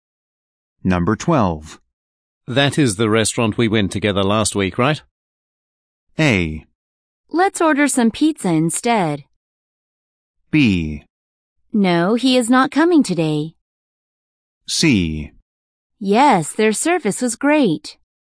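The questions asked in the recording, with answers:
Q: That is the restaurant we went together last week, right?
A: C: Yes, their service was great.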